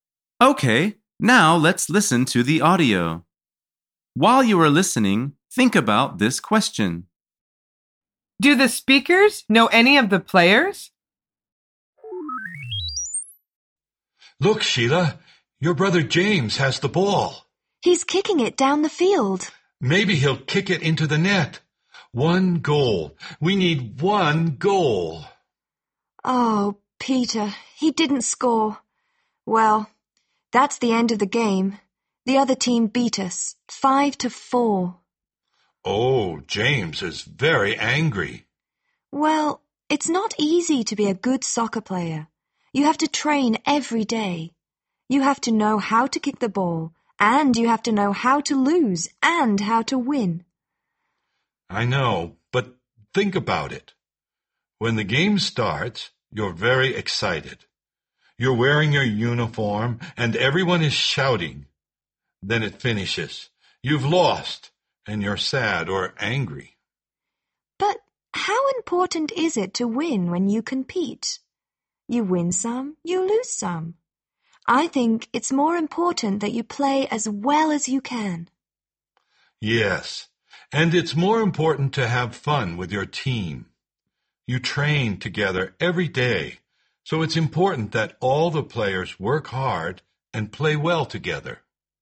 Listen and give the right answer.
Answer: The answer is yes. One of the players is the woman's brother.